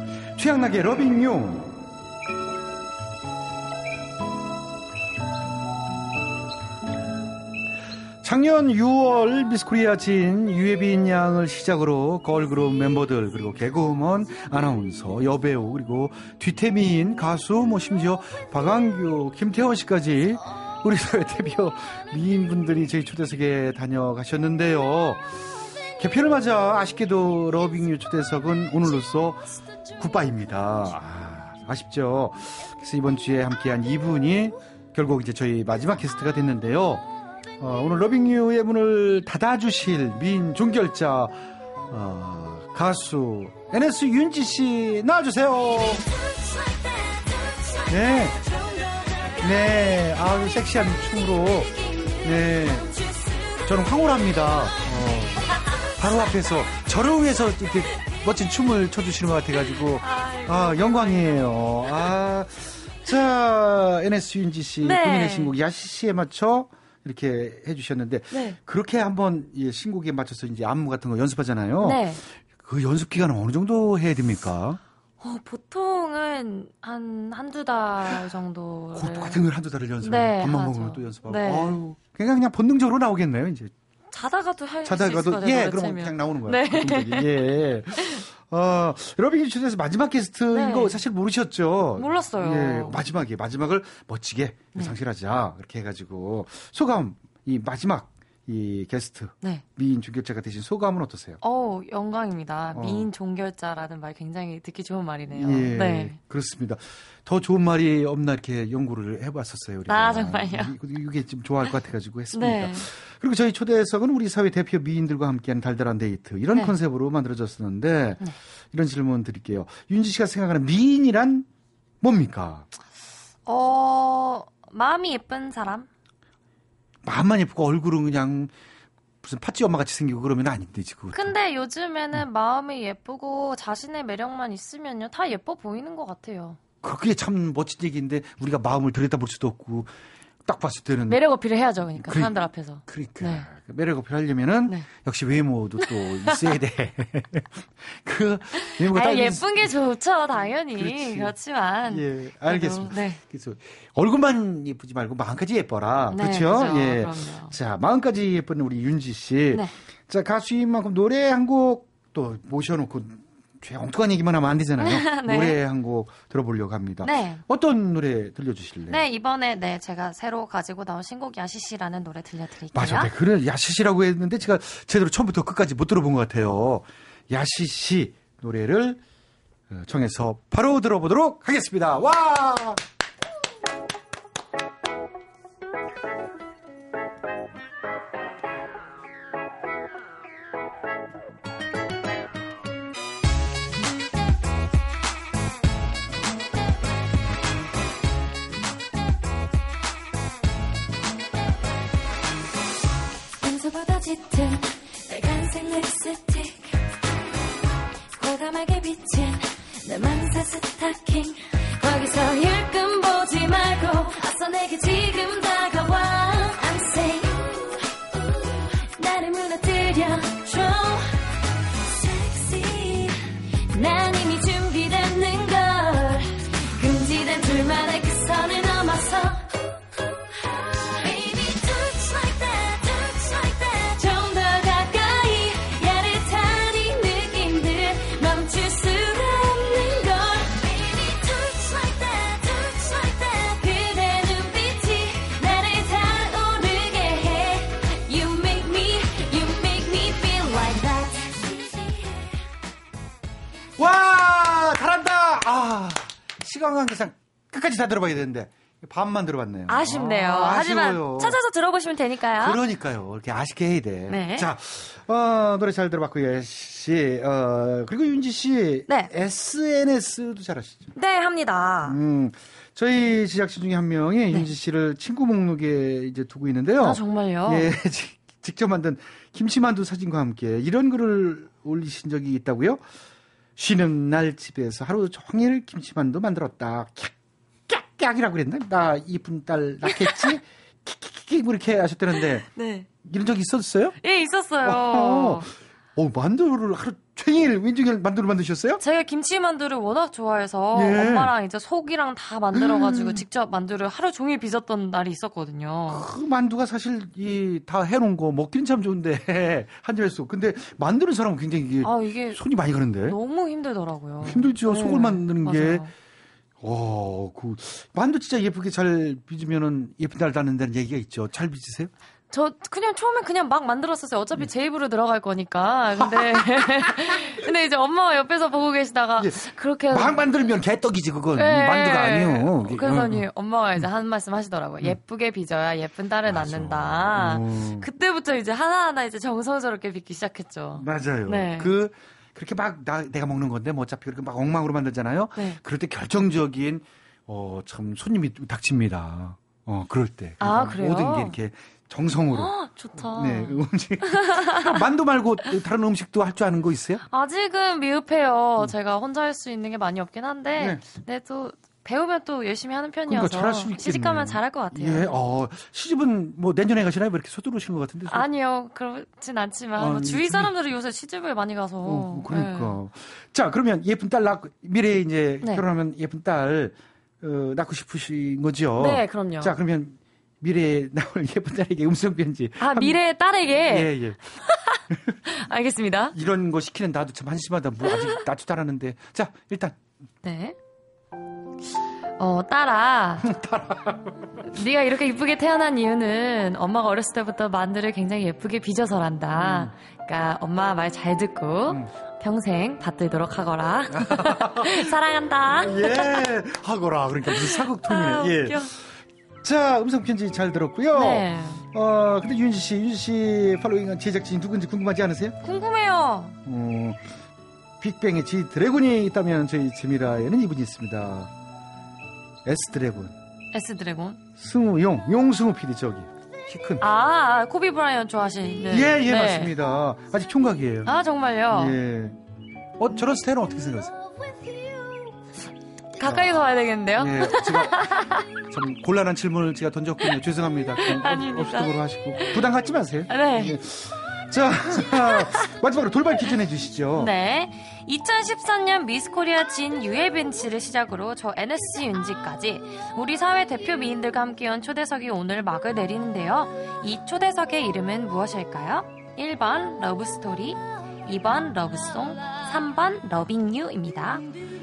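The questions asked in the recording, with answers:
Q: 이 초대석의 이름은 무엇일까요? 1번 러브스토리, 2번 러브송, 3번 러빙유입니다.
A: 3: 러빙유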